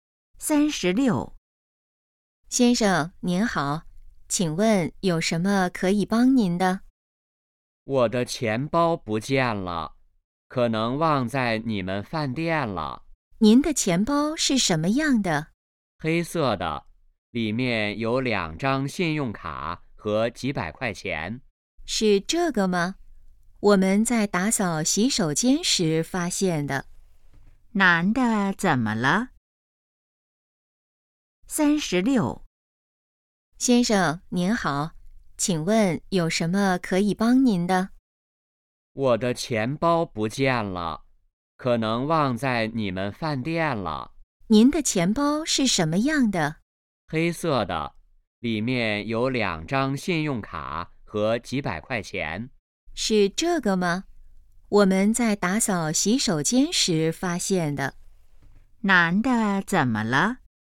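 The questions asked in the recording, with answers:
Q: 男的怎么了?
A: 钱包不见了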